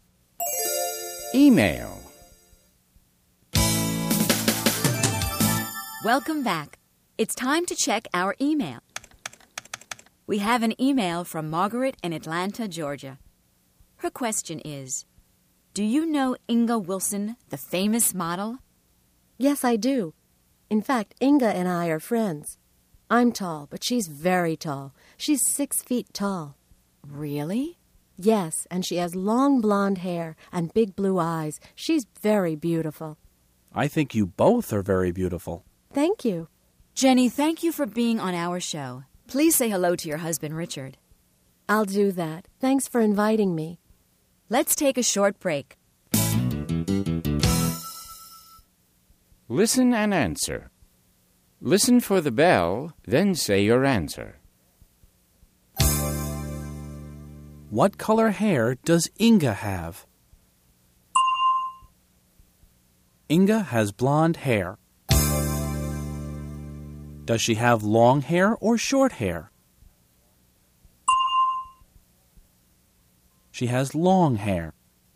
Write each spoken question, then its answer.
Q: What color hair does Inga have?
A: Inga has blonde hair.